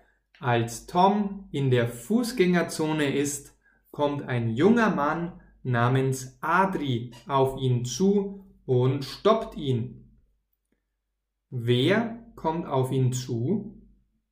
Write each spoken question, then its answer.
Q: Wer kommt auf ihn zu?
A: Ein junger Mann namens Adri.